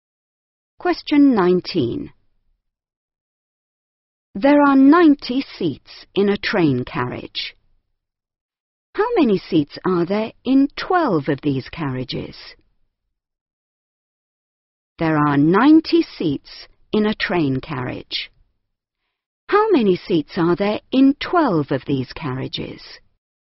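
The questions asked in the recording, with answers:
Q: How many seats are there in 12 of these carriages?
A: 1080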